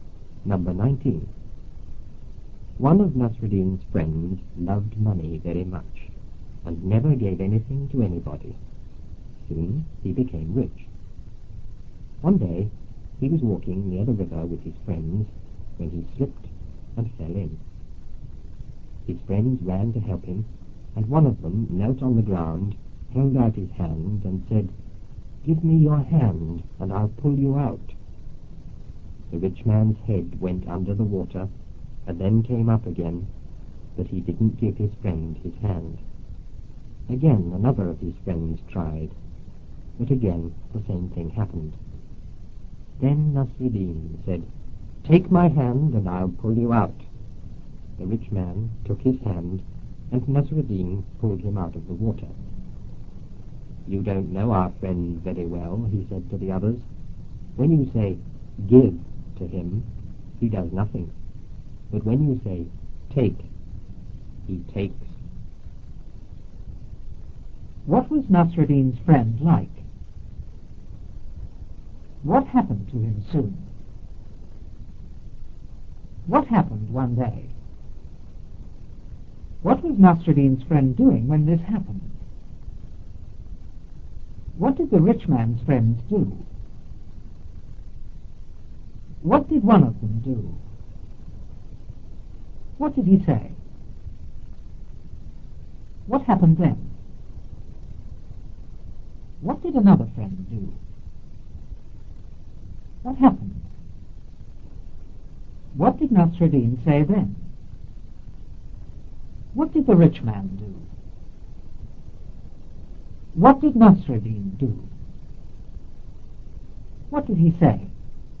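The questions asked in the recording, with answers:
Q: What was Nasruddin's friend like?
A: He loved money very much and never gave anything to anybody.

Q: What happened to him soon?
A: He became rich.

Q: What happened one day?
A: He slipped and fell in the river.

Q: What was Nasruddin's friend doing when this happened?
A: Walking near the river with his friends.

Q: What did the rich man's friend do?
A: They ran to help him.

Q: What did one of them do?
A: He knelt on the ground and held out his hand.

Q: What did he say?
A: "Give me your hand and I'll pull you out."

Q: What happened then?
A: The rich man's head went under the water and came up again, but he didn't give his hand.

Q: What did another friend do?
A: He tried too.

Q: What happened?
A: The same thing happened again.

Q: What did Nasruddin say then?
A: "Take my hand and I'll pull you out."

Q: What did the rich man do?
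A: He took Nasruddin's hand.

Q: What did Nasruddin do?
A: He pulled him out of the water.

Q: What did he say?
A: "You don't know our friend very well. When you say give to him, he does nothing. But when you say take, he takes."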